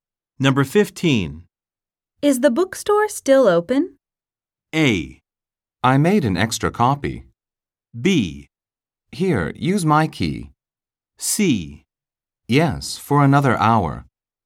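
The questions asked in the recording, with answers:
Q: Is the bookstore still open?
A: C: Yes, for another hour.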